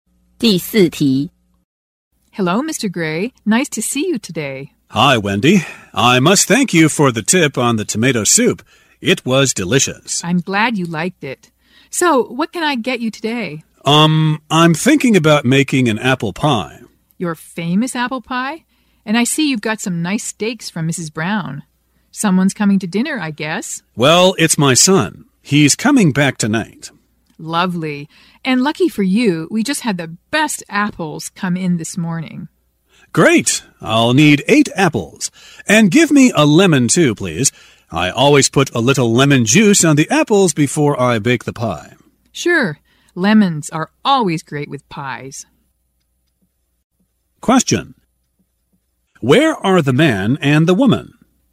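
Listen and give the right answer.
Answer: In a grocery store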